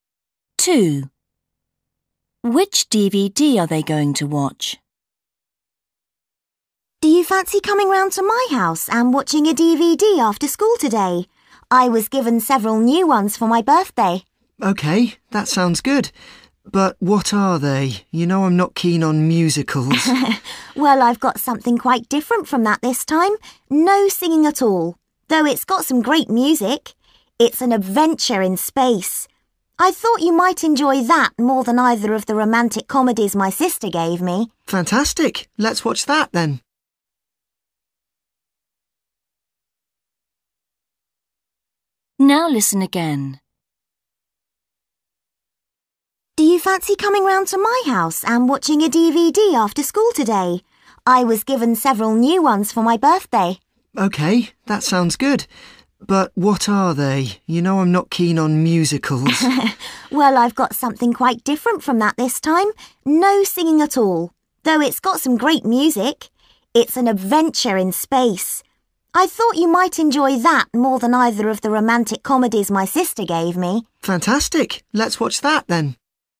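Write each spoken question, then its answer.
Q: Which DVD are they going to watch?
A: a space adventure film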